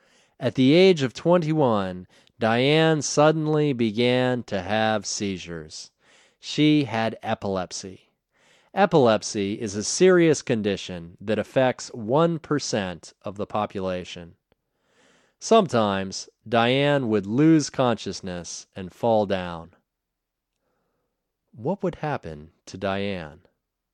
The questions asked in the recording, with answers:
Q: What would happen to Diane?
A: Sometimes Diane would lose consciousness and fall down.